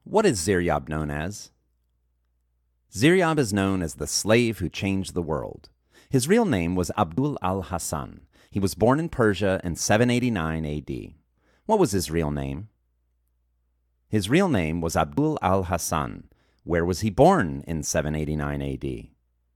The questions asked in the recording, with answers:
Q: What was his real name?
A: His real name was Abdul al-Hasan.